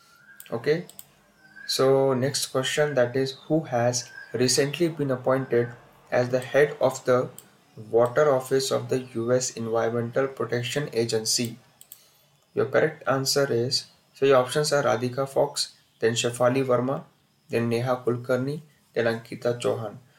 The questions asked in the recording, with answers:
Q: who has recently been appointed as the head of the water office of the US Environmental Protection Agency?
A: So answer is Radhika Fox.